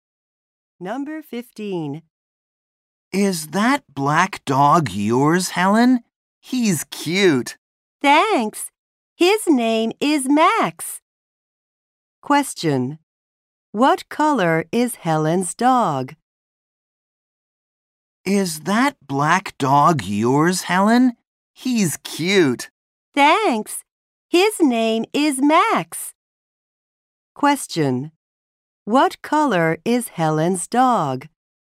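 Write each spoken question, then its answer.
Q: What color is Helen's dog?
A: Black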